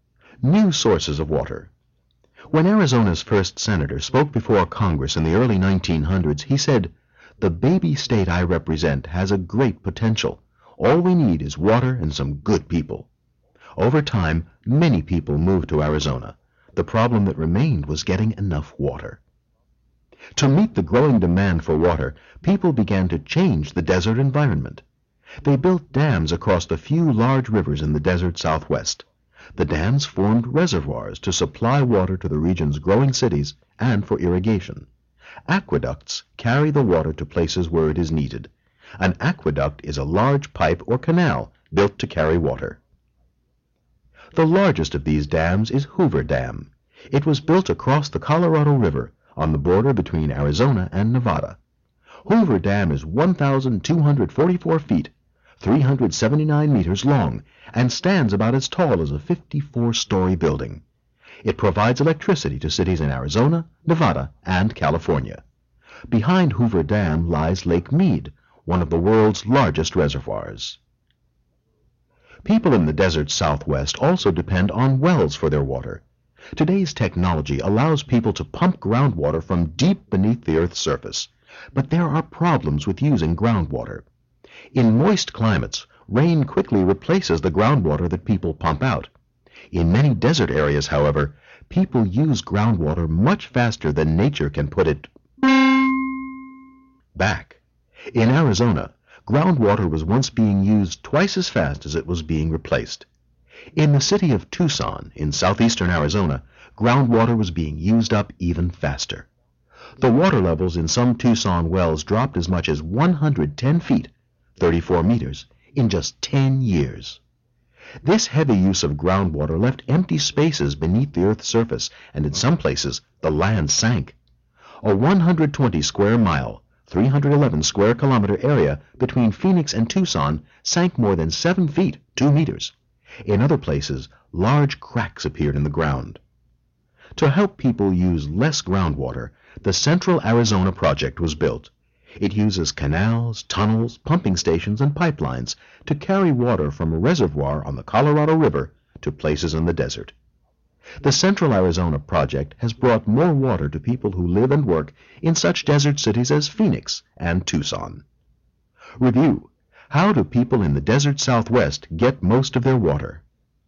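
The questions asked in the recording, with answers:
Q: how do people in the desert southwest get most of their water?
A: From reservoirs formed by dams (through aqueducts) and from wells that pump groundwater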